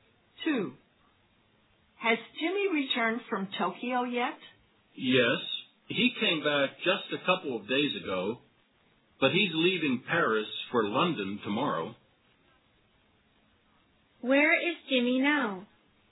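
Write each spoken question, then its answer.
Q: Where is Jimmy now?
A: In Paris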